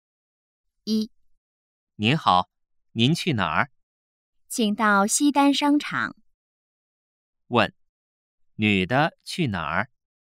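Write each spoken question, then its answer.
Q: 问,女的去哪儿?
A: 西单商场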